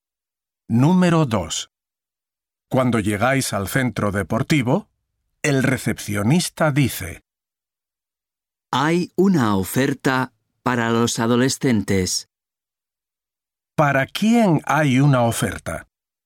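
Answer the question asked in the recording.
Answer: Para los adolescentes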